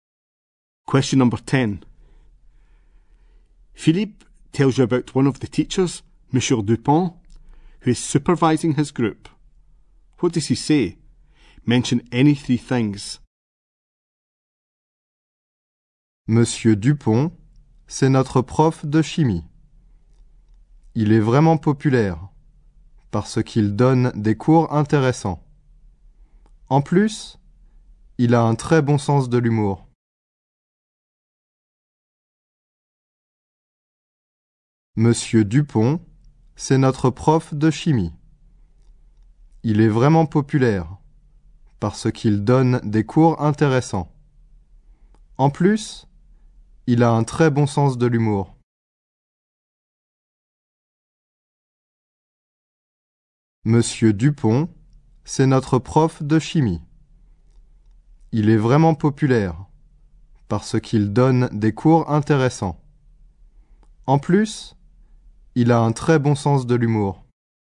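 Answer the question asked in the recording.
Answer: He is their chemistry teacher; he is very popular; his lessons are interesting; he has a very good sense of humour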